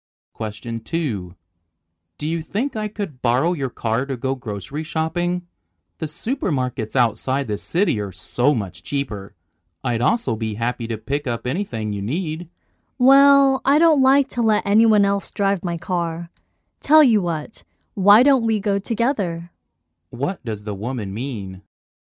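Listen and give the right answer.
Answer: She won't lend her car but offers to go shopping with the man.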